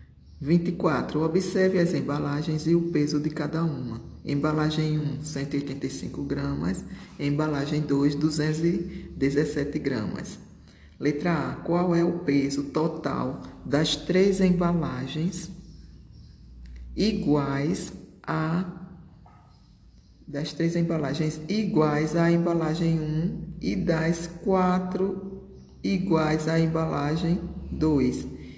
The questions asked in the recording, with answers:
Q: Letra A. Qual é o peso total das três embalagens iguais a das três embalagens iguais à embalagem 1 e das quatro iguais à embalagem 2.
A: O peso das sete embalagens é de 1423 gramas.